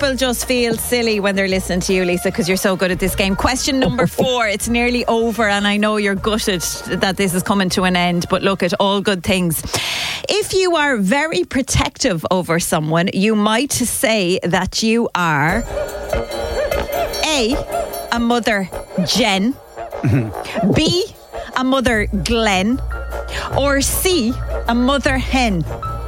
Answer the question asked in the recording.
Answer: 100% mother hen.